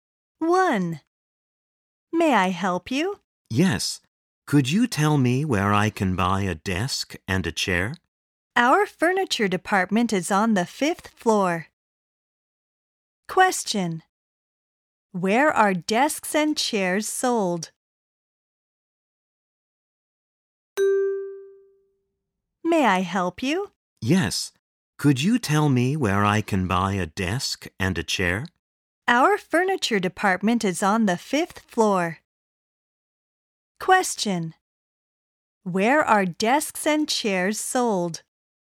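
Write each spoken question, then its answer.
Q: Where are desks and chairs sold?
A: On the 5th floor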